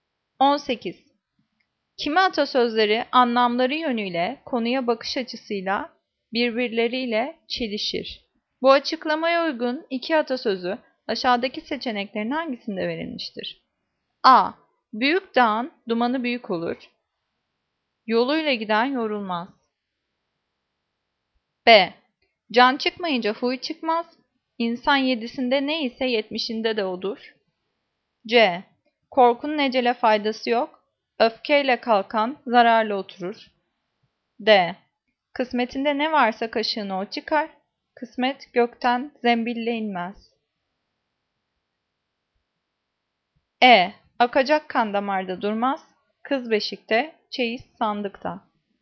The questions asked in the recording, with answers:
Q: Bu açıklamaya uygun iki atasözü aşağıdaki seçeneklerin hangisinde verilmiştir?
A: Cevap D. Kısmetinde ne varsa kaşığını o çıkar.